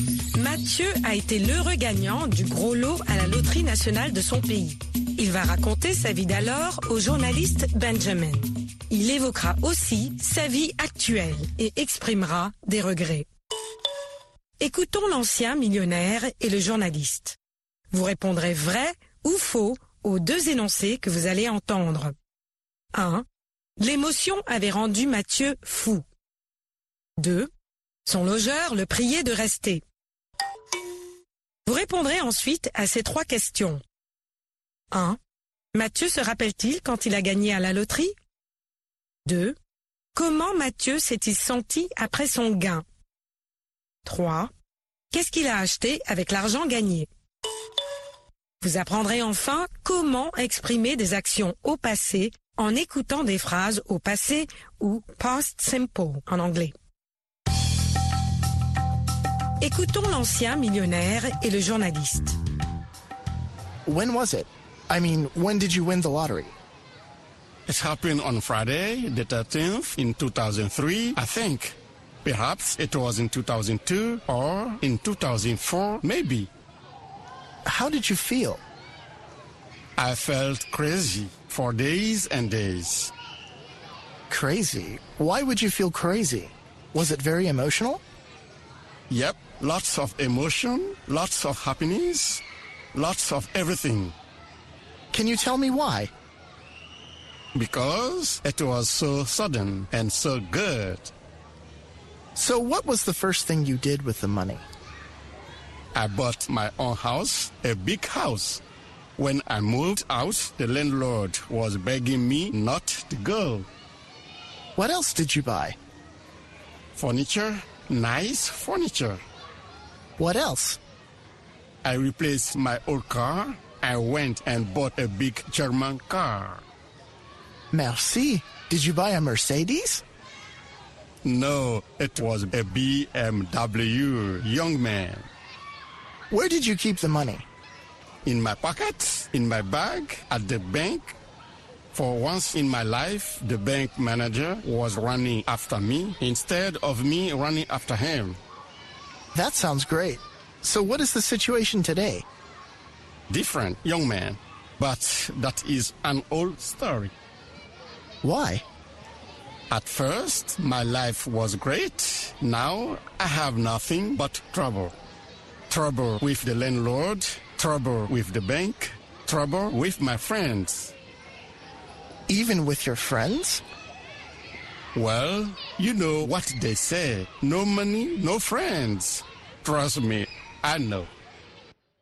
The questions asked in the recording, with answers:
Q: Mathieu se rappelle-t-il quand il a gagné à la loterie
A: Non.

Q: Son logeur le priait de rester.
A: L'énoncé 2 est vrai. Son logeur l'a prié de rester.

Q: Qu'est-ce qu'il a acheté avec l'argent gagné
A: Une maison, des meubles et une voiture.